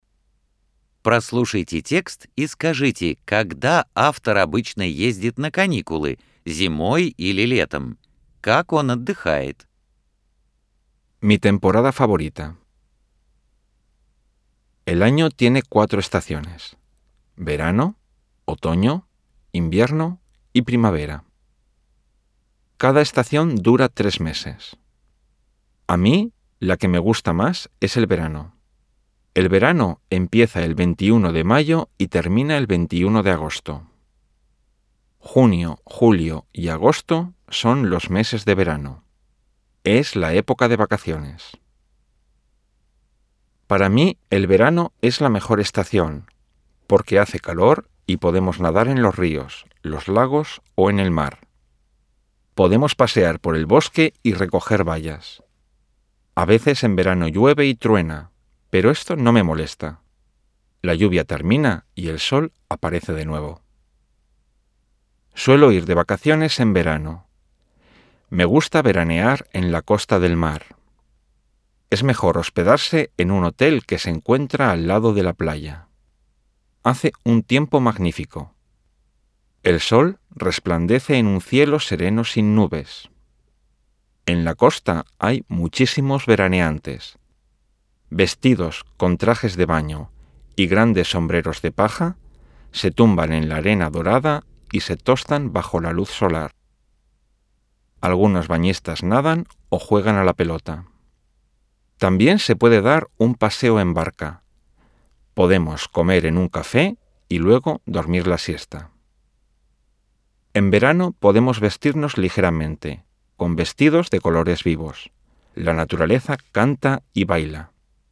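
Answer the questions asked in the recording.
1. Летом
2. На морском побережье: живёт в отеле у пляжа, загорает, плавает, играет в мяч, катается на лодке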